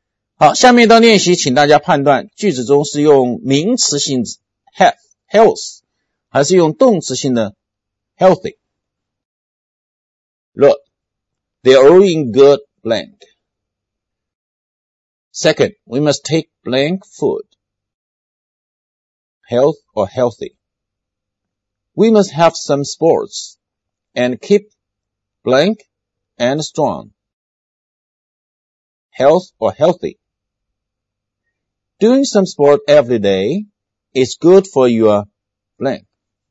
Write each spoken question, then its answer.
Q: Look, they're all in good blank.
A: We are all in good health.

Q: we must take blank food.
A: We must take healthy food.

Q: We must have some sports and keep blankand strong.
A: And we must have some sports and keep healthy and strong.

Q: Doing some sport every day is good for your blank.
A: Doing some sport every day is good for your health.